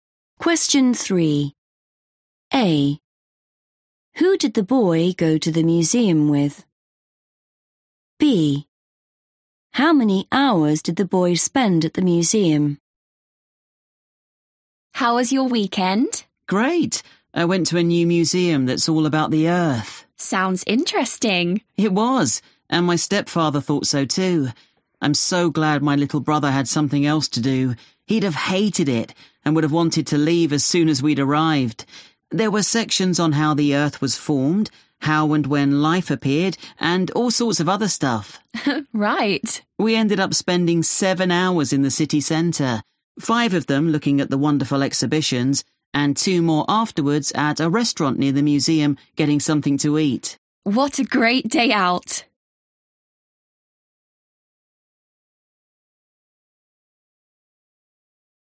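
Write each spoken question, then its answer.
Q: Who did the boy go to the museum with?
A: his stepfather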